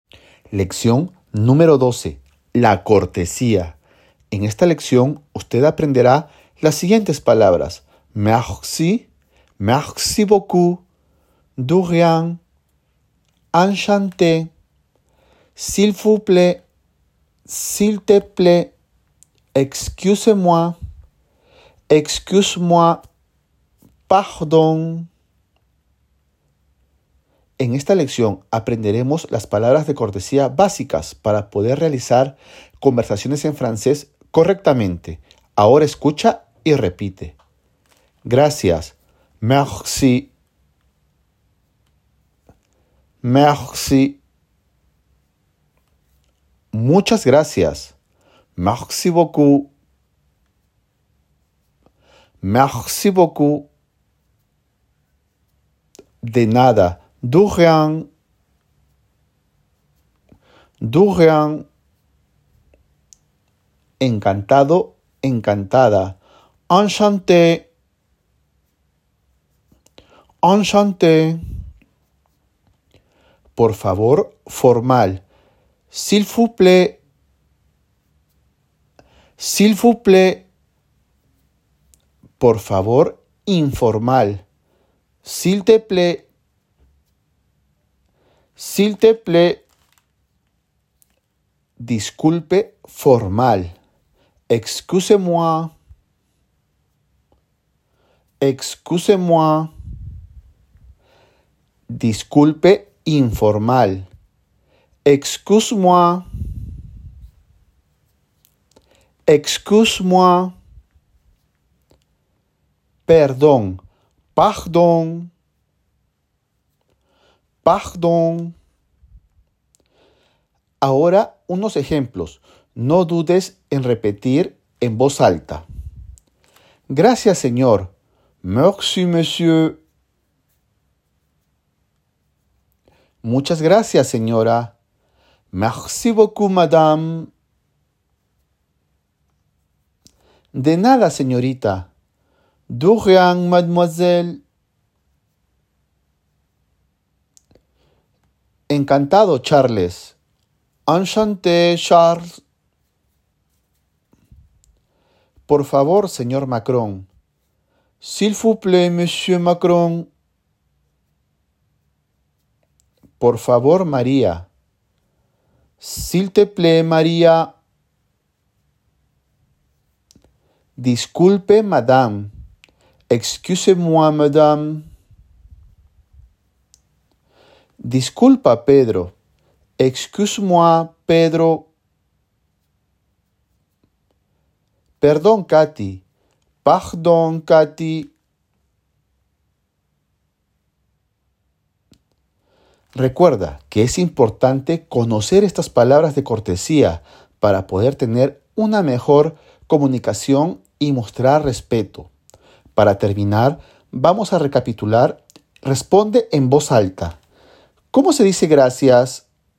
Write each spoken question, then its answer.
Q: ¿Cómo se dice gracias?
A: merci